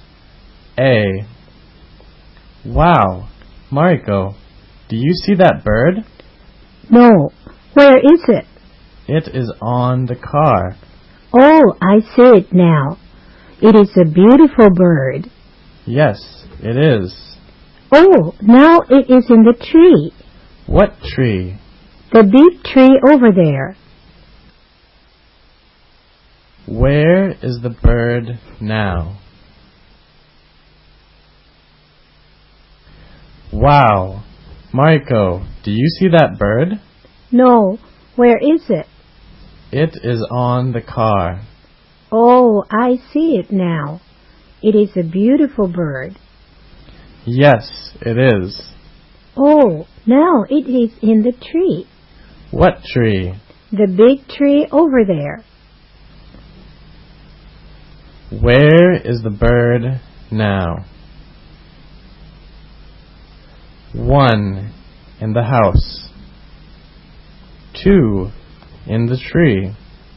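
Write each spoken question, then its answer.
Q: Where is the bird now?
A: 2: in the tree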